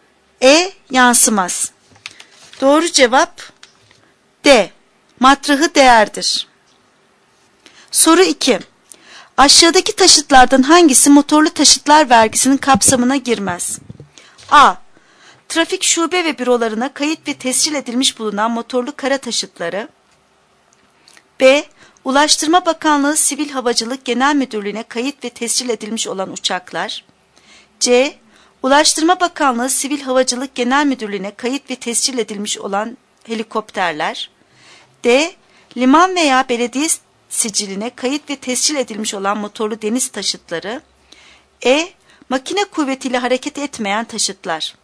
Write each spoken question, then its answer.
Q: Aşağıdaki taşıtlardan hangisi motorlu taşıtlar vergisinin kapsamına girmez?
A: Doğru cevap E. Makine kuvvetiyle hareket etmeyen taşıtlar.